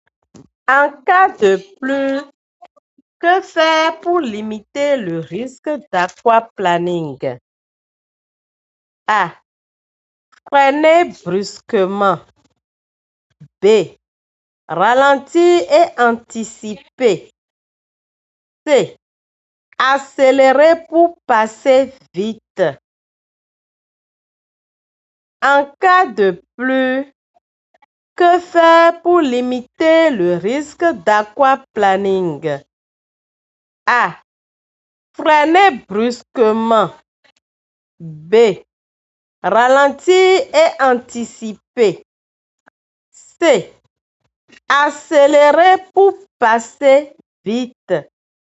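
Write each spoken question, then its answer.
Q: En cas de pluie, que faire pour limiter le risque d'aquaplaning?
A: B: Ralentir et anticiper.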